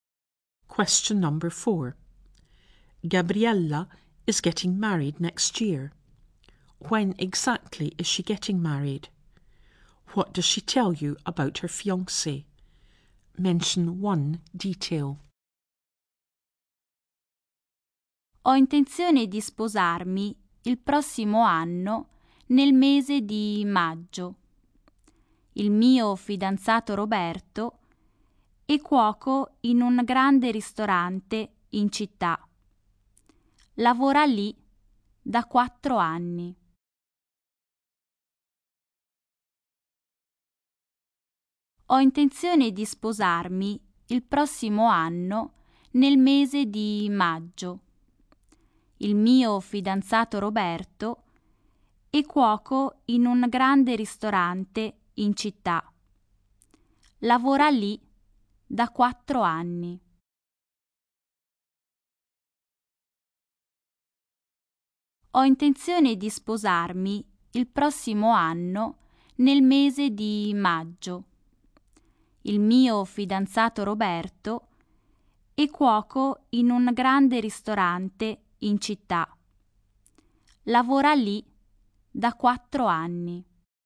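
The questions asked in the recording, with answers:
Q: When exactly is she getting married?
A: Next year, in May

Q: What does she tell you about her fiancé?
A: Roberto is a cook in a big restaurant in town and has worked there for 4 years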